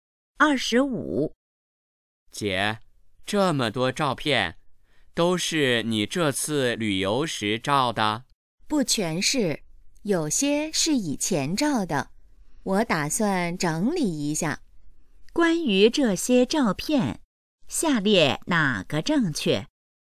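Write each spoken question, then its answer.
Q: 关于这些照片,下列哪个正确?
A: 不全是这次旅游时照的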